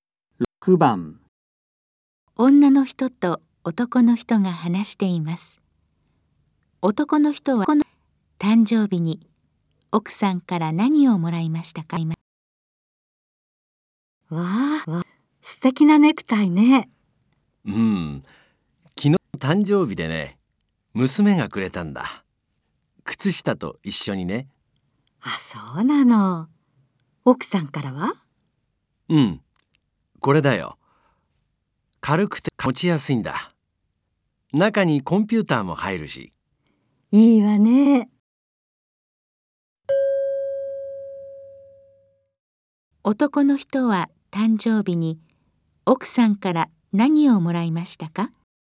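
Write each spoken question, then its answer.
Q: 男の人は誕生日に奥さんから何をもらいましたか?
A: かばん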